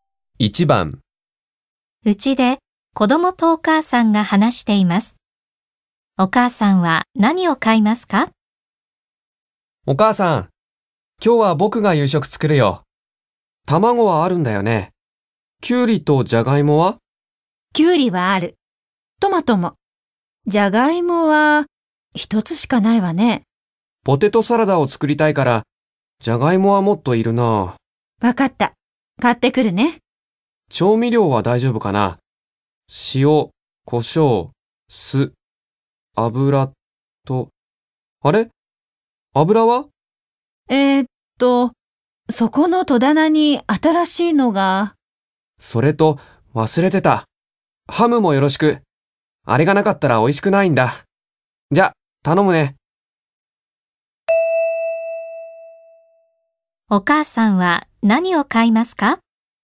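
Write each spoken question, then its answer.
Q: お母さんは何を買いますか?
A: じゃがいもとハム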